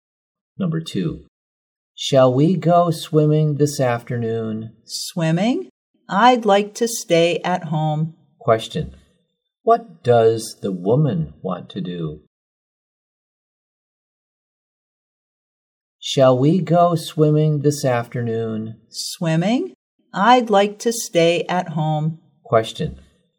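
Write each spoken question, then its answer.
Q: Question, what does the woman want to do?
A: Stay at home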